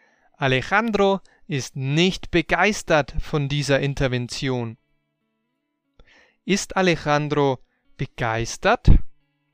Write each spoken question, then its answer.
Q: Ist Alejandro begeistert?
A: Nein, er ist nicht begeistert von dieser Intervention.